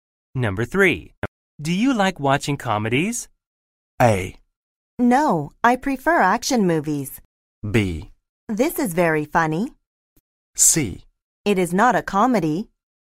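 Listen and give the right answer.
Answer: A: No, I prefer action movies.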